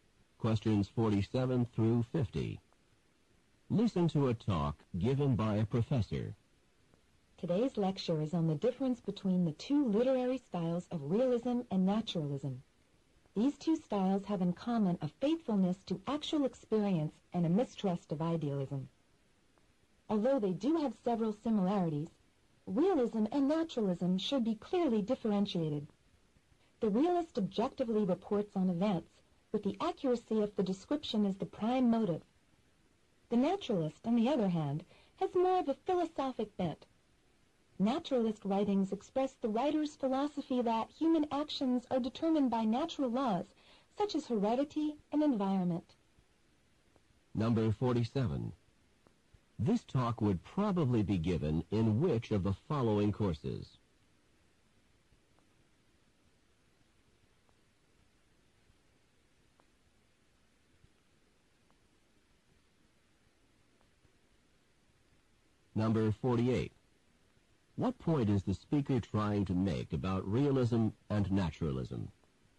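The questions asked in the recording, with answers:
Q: What point is the speaker trying to make about realism and naturalism?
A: They should be clearly differentiated despite similarities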